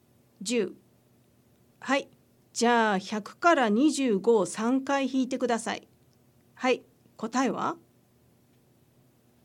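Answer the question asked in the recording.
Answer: 25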